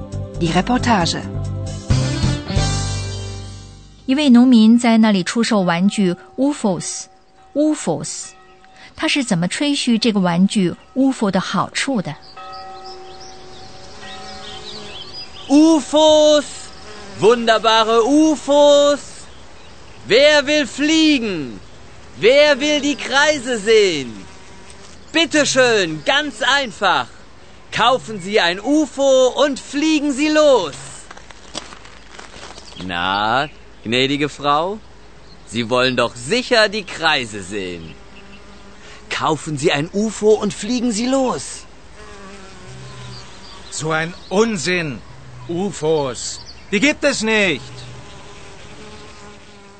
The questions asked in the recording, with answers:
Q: 他是怎么吹嘘这个玩具 UFO 的好处的?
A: 他说,人家应该kaufen, 买, kaufen, 然后就 losfliegen, 开始飞.